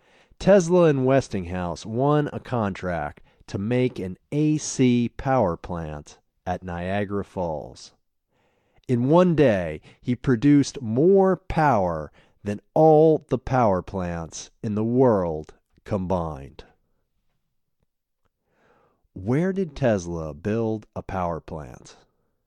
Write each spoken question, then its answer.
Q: Where did Tesla build a power plant?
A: Tesla built a power plant at Niagara Falls.